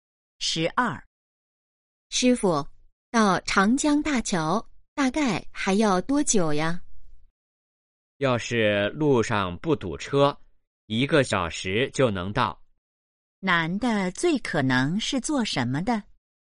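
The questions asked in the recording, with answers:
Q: 男的最可能是做什么的?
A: 司机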